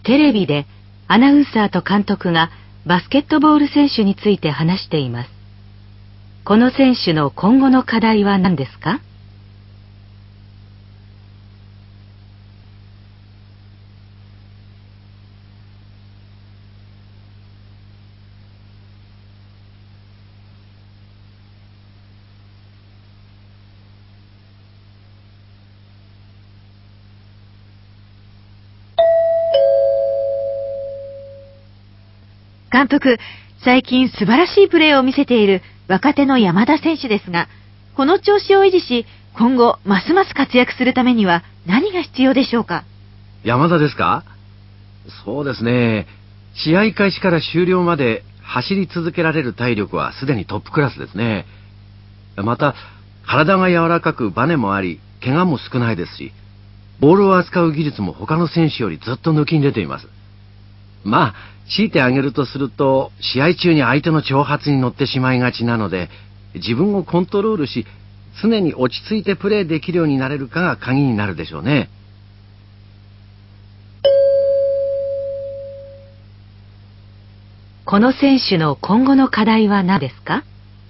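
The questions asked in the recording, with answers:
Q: この選手の今後の課題は何ですか?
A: 試合中に相手の挑発に乗らず、自分をコントロールして常に落ち着いてプレーすること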